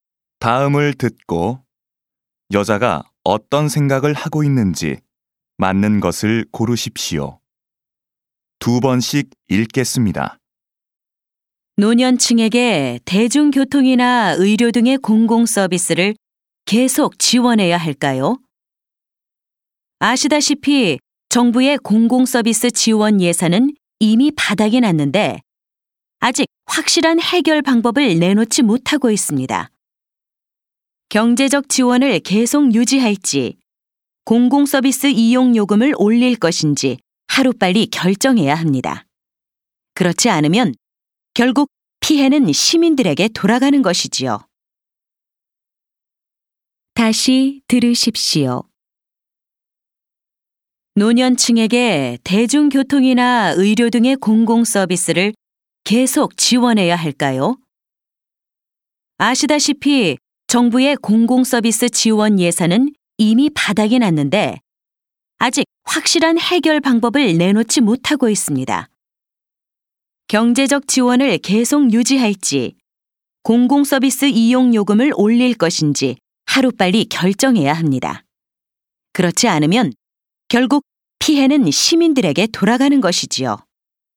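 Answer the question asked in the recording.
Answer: 노년층 공공서비스 지원 문제(지원 유지 또는 요금 인상)를 하루빨리 결정해야 한다.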